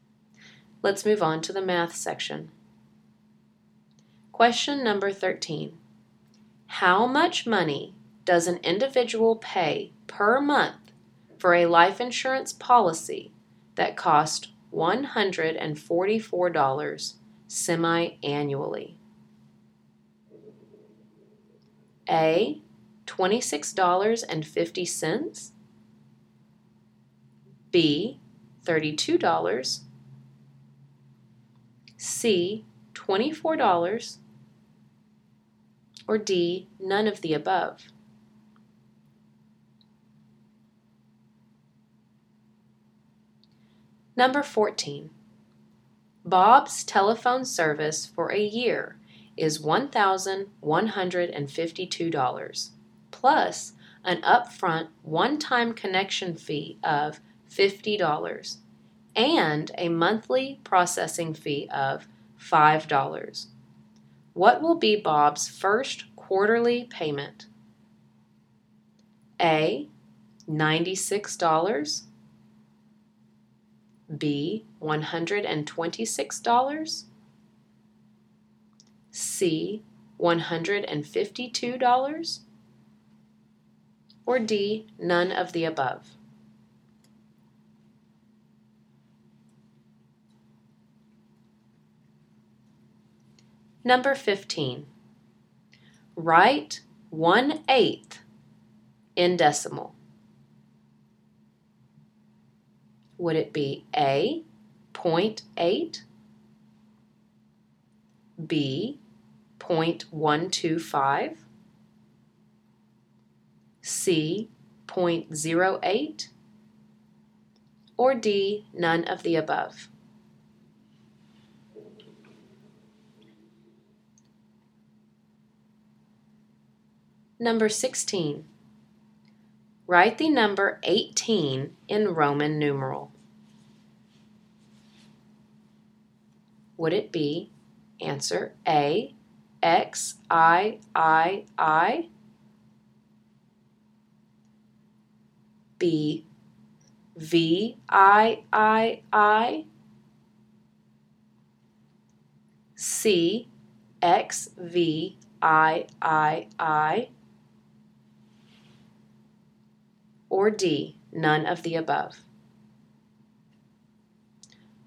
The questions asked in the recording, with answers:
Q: How much money does an individual pay per month for a life insurance policy that costs $144 semi-annually?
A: For number 13, the answer is C.

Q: What will be Bob's first quarterly payment?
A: Number 14 is D.

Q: Write 1/8 in decimal.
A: For number 15, the answer is B.

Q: Write the number 18 in Roman numeral.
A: And for number 16, the answer is C, XVIII.